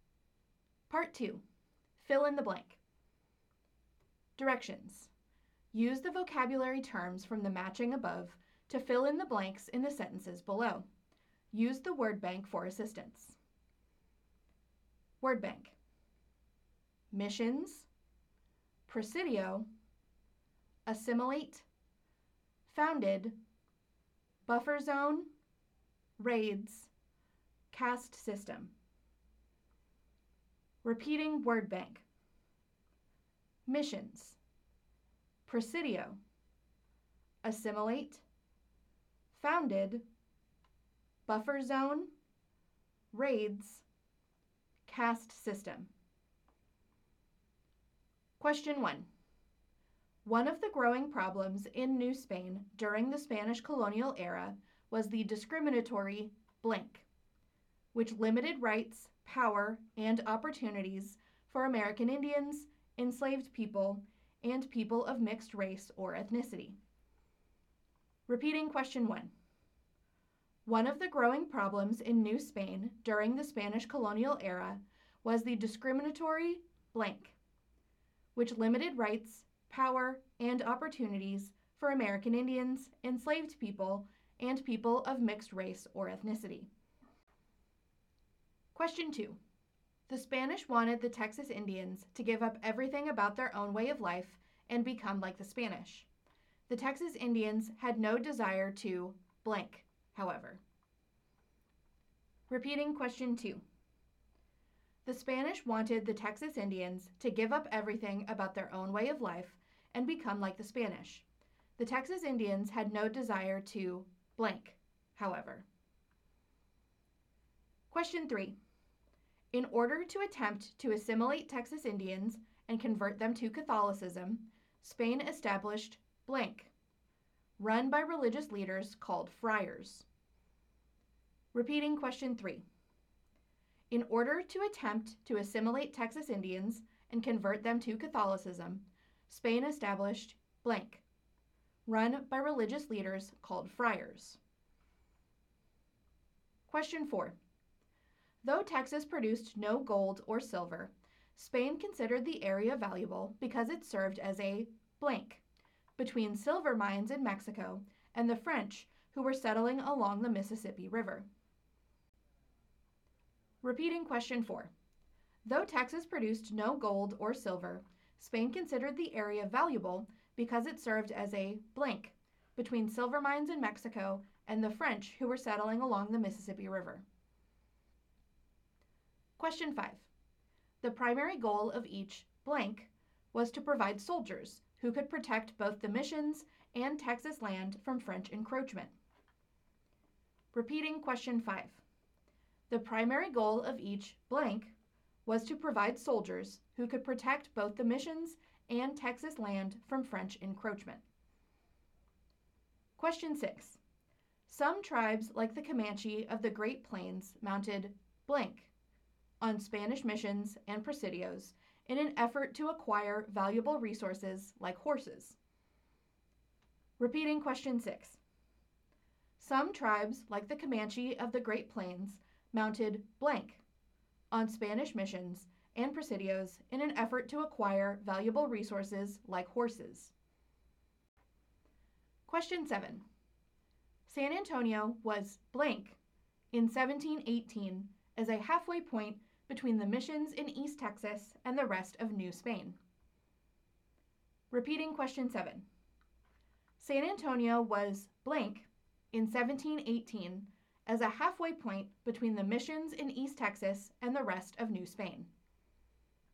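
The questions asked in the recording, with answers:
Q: One of the growing problems in New Spain during the Spanish colonial era was the discriminatory blank, which limited rights, power, and opportunities for American Indians, enslaved people, and people of mixed race or ethnicity.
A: caste system

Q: The Spanish wanted the Texas Indians to give up everything about their own way of life and become like the Spanish. The Texas Indians had no desire to blank, however.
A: assimilate

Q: In order to attempt to assimilate Texas Indians and convert them to Catholicism, Spain established blank, run by religious leaders called friars.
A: missions

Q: Though Texas produced no gold or silver, Spain considered the area valuable because it served as a blank between silver mines in Mexico and the French who were settling along the Mississippi River.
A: buffer zone

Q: The primary goal of each blank was to provide soldiers who could protect both the missions and Texas land from French encroachment.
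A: presidio

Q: Some tribes like the Comanche of the Great Plains mounted blank on Spanish missions and presidios in an effort to acquire valuable resources like horses.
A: raids

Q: San Antonio was blank in 1718 as a halfway point between the missions in East Texas and the rest of New Spain.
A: founded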